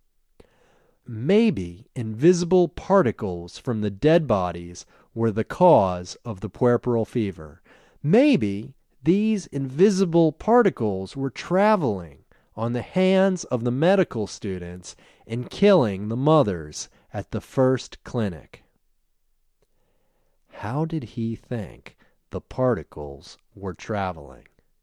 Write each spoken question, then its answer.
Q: How did he think the particles were traveling?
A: He thought the particles were traveling on the hands of medical students.